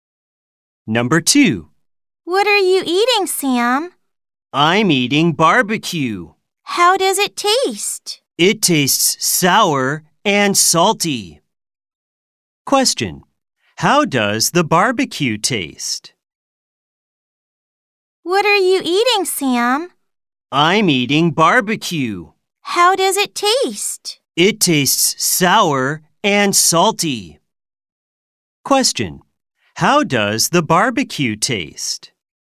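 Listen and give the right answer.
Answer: Sour and salty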